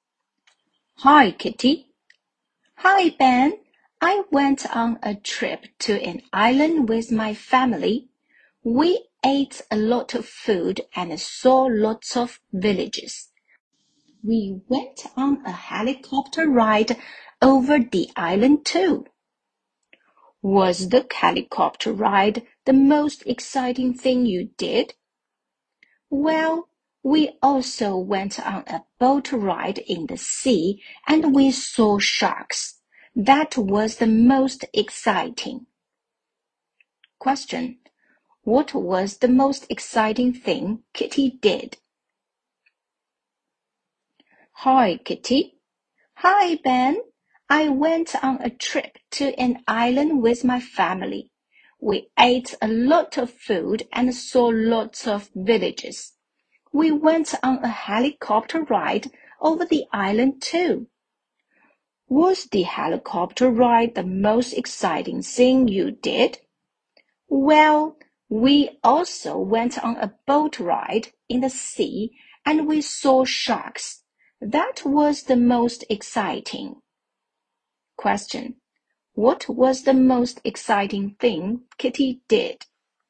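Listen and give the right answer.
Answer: The boat ride in the sea (seeing sharks)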